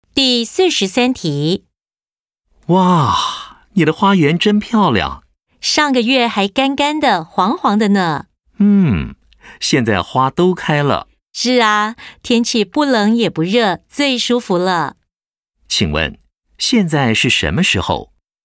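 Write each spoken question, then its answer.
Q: 请问,现在是什么时候?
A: 春天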